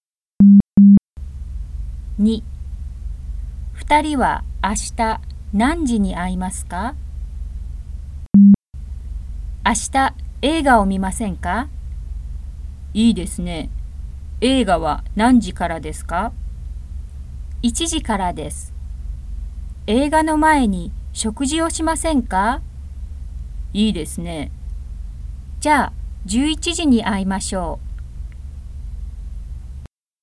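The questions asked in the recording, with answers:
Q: 2人は明日何時に会いますか?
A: 11時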